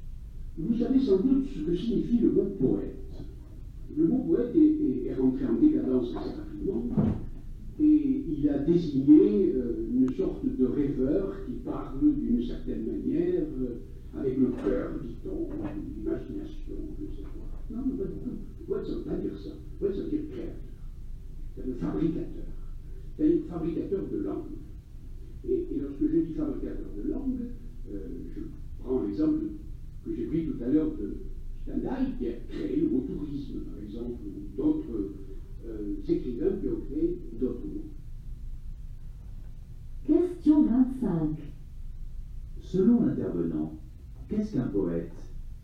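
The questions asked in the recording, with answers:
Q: Selon l'intervenant, qu'est-ce qu'un poète ?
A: Un créateur, un fabricateur de langue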